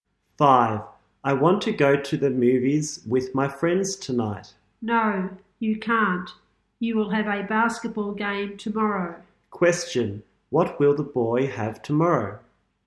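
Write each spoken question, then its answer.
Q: What will the boy have tomorrow?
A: A basketball game.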